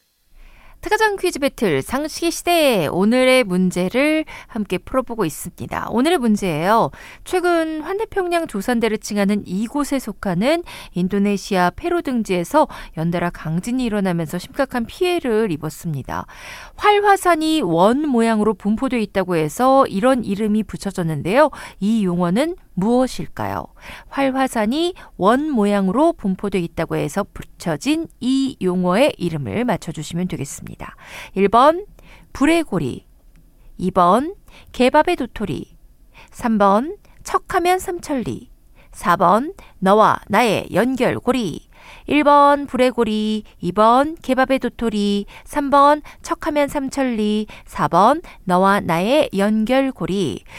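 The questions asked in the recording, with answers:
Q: 이 용어는 무엇일까요?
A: 1번: 불의 고리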